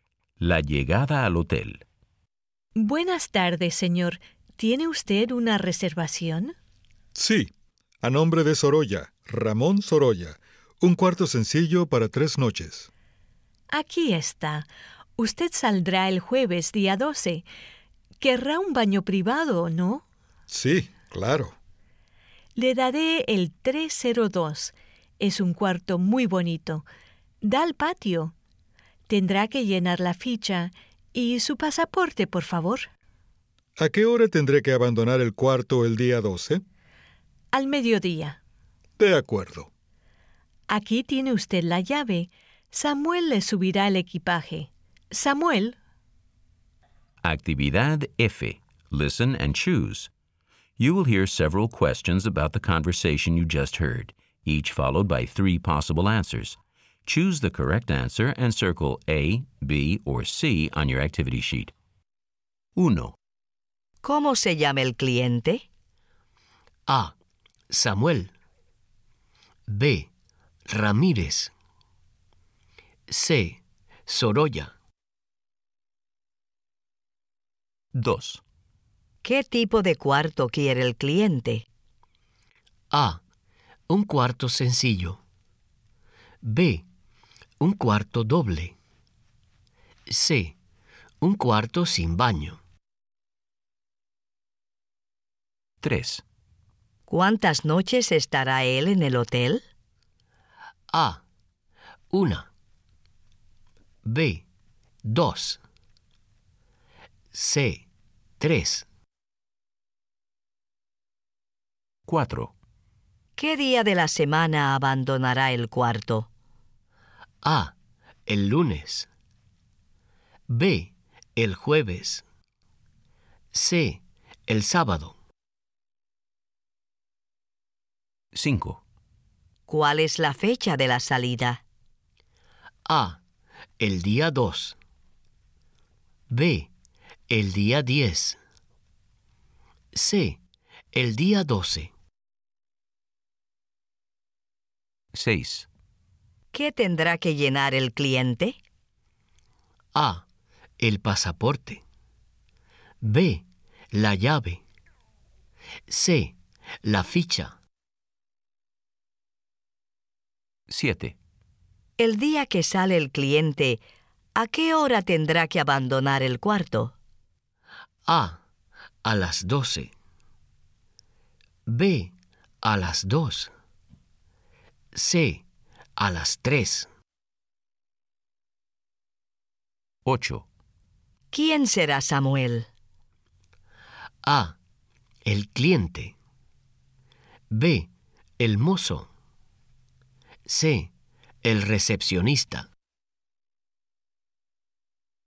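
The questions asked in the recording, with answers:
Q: ¿Cómo se llama el cliente?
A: C: Sorolla.

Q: ¿Qué tipo de cuarto quiere el cliente?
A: A: Un cuarto sencillo.

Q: ¿Cuántas noches estará él en el hotel?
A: C: 3.

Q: ¿Qué día de la semana abandonará el cuarto?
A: B: El jueves.

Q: ¿Cuál es la fecha de la salida?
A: C: El día 12.

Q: ¿Qué tendrá que llenar el cliente?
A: C: La ficha.

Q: El día que sale el cliente, ¿a qué hora tendrá que abandonar el cuarto?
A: A: A las 12.

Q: ¿Quién será Samuel?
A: B: El mozo.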